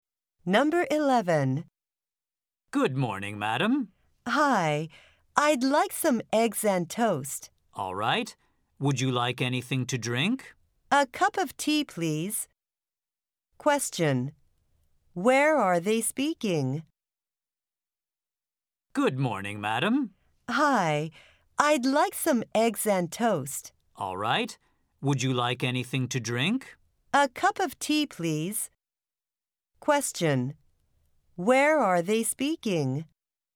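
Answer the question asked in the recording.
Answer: In a restaurant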